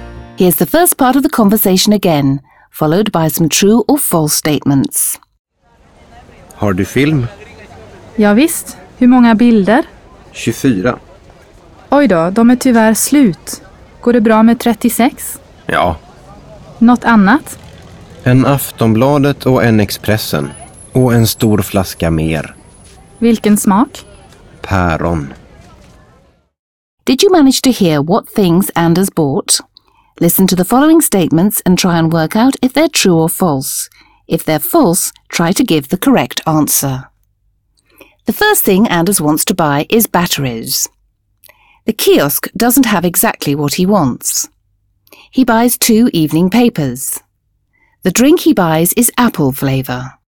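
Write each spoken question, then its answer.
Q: The first thing Anders wants to buy is batteries.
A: False: he wants film

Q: The kiosk doesn't have exactly what he wants.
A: True

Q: He buys two evening papers.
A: True

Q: The drink he buys is apple flavour.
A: False: it is pear flavour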